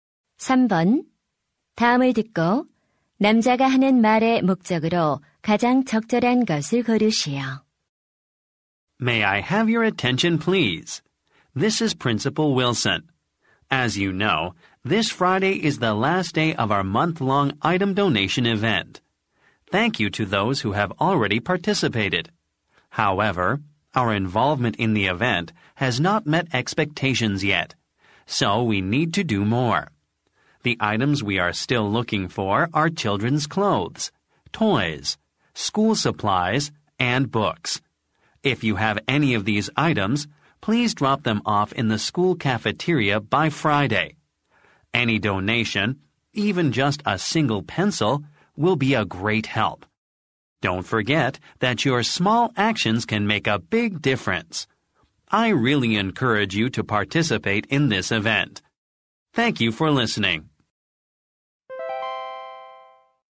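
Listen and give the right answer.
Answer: 물품 기부 행사 참여를 독려하려고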